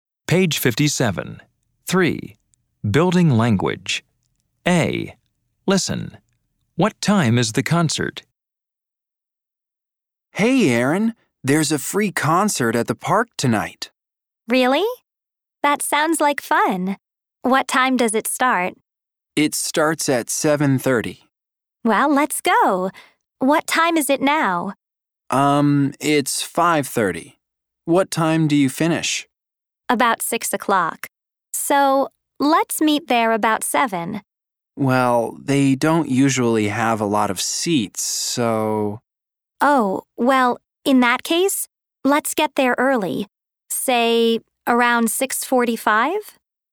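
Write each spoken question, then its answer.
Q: What time is the concert?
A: 7:30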